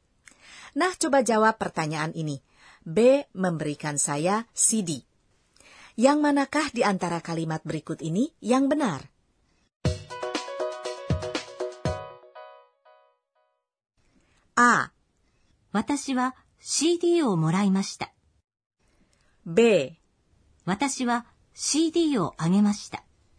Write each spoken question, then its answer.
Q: B memberikan saya CD. Yang manakah di antara kalimat berikut ini yang benar?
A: Jawabannya A kan?